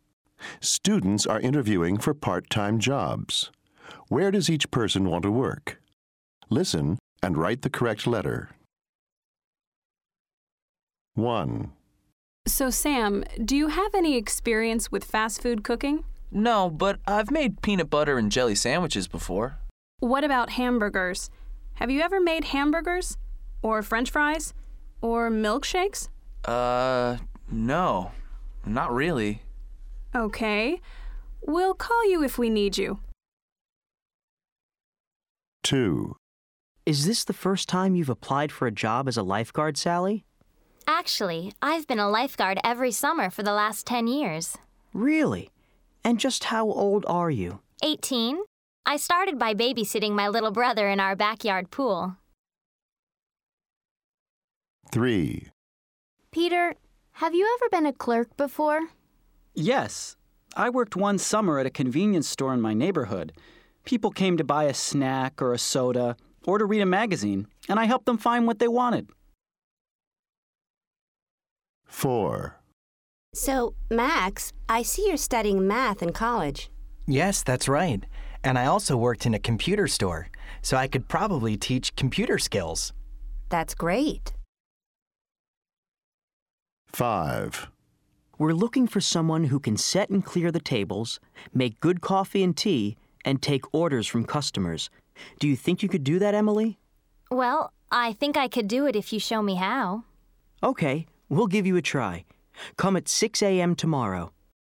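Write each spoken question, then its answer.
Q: Where does each person want to work?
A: At a fast food restaurant

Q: Where does each person want to work?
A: At a swimming pool, as a lifeguard

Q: Where does each person want to work?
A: At a store, as a clerk

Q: Where does each person want to work?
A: At a restaurant or café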